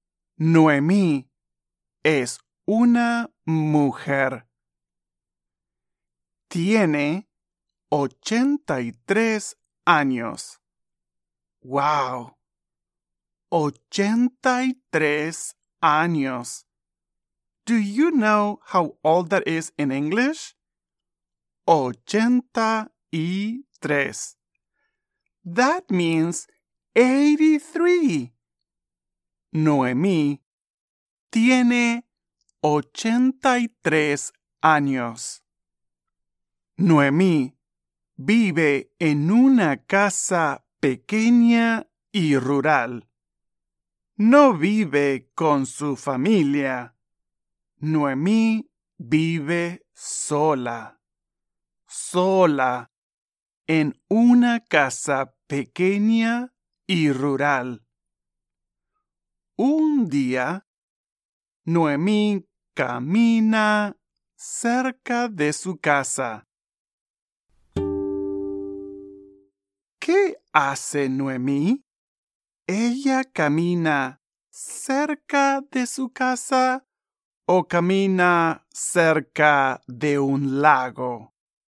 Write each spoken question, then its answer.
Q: ¿Qué hace Noemí? ¿Ella camina cerca de su casa o camina cerca de un lago?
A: Sí, tienes razón. Noemí camina cerca de su casa.